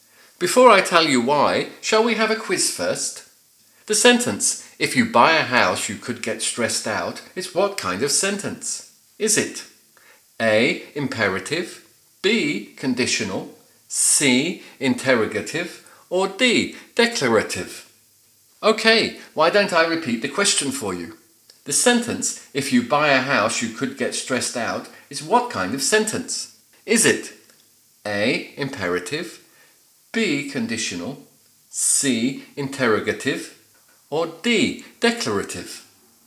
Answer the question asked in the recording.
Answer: Did you manage to work out that it's B, conditional?